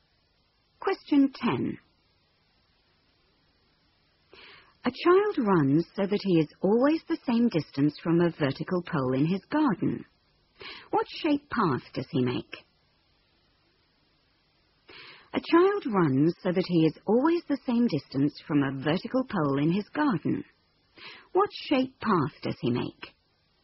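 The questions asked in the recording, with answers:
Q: What shape path does he make?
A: A circle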